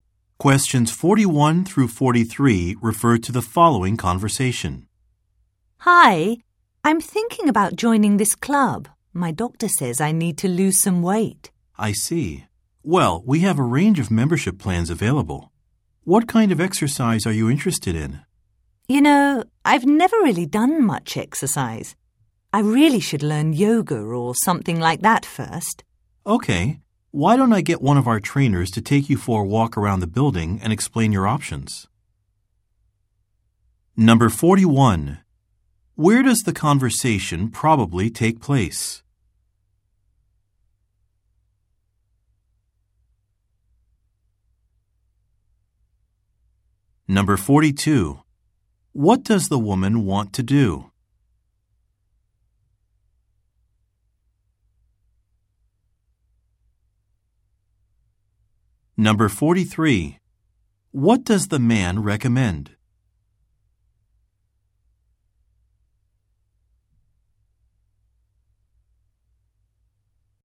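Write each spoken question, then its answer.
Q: Where does the conversation probably take place?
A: At a fitness club (gym)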